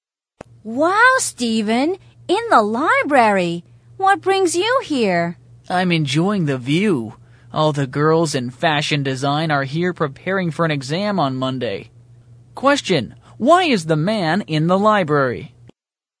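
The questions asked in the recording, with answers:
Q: why is the man in the library?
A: To look at the girls from fashion design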